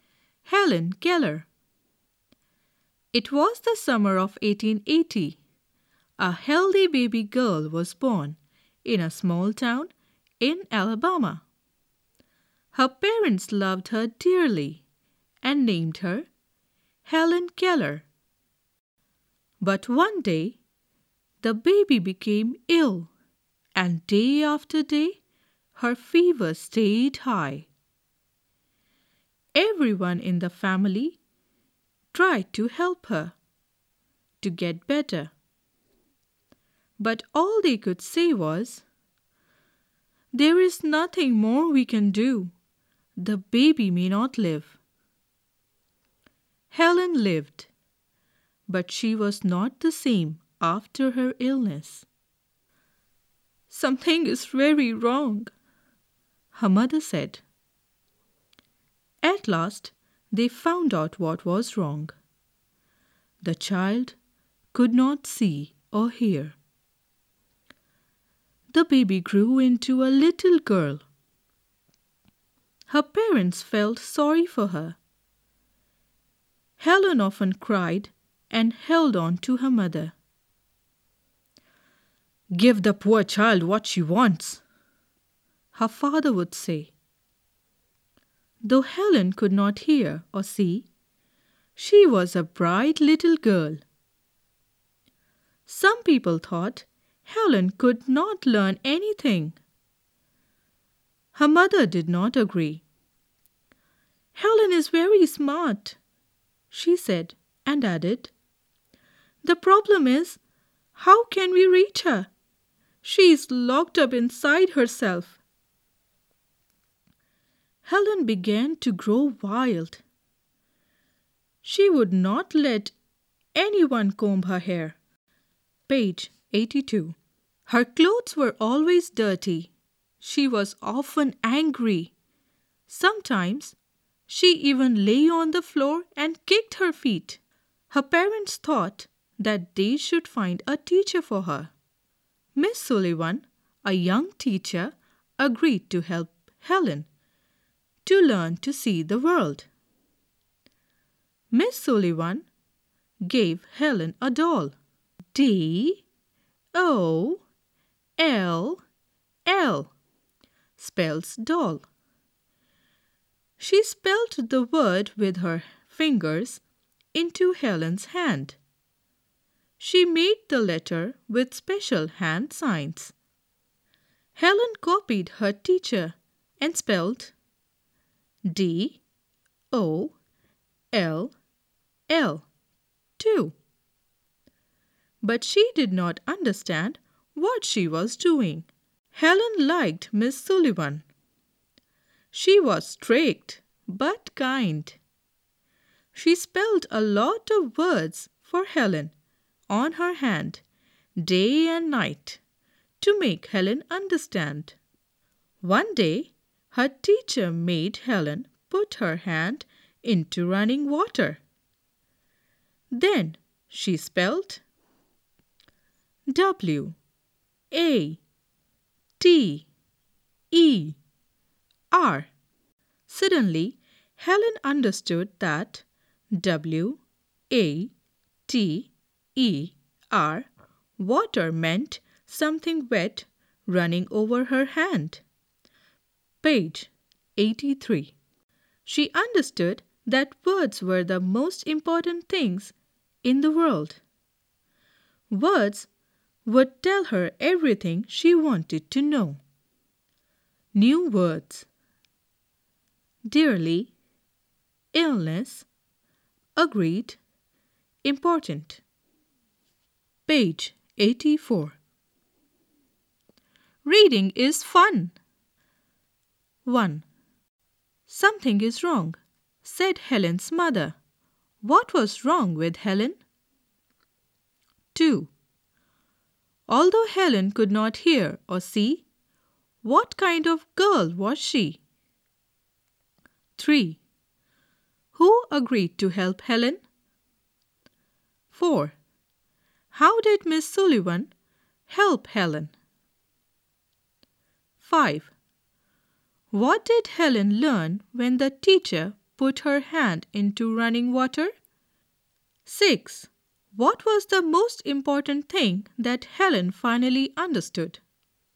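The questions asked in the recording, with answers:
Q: What was wrong with Helen?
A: She could not see or hear.

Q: Although Helen could not hear or see, what kind of girl was she?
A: A bright little girl.

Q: Who agreed to help Helen?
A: Miss Sullivan, a young teacher.

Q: How did Miss Sullivan help Helen?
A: She spelled words into Helen's hand with special hand signs.

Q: What did Helen learn when the teacher put her hand into running water?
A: That W-A-T-E-R meant the wet thing running over her hand.

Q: What was the most important thing that Helen finally understood?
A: That words were the most important things in the world.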